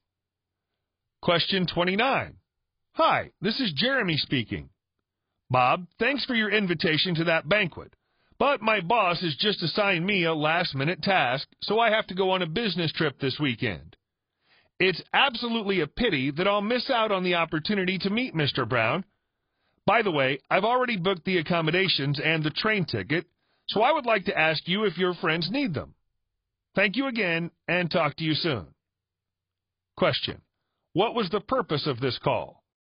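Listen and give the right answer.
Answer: To decline Bob's invitation to the banquet because he has to go on a business trip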